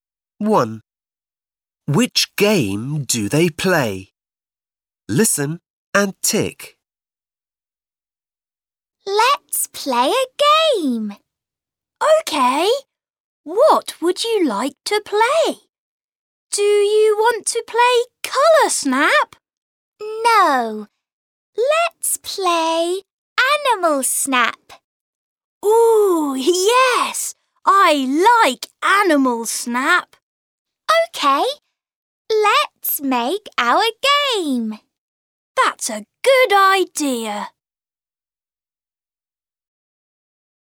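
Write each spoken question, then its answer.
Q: Which game do they play?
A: Animal Snap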